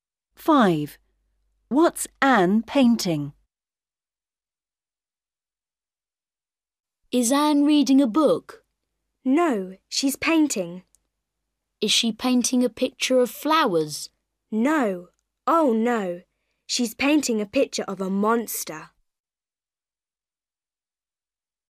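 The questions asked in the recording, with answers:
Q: What's Anne painting?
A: a picture of a monster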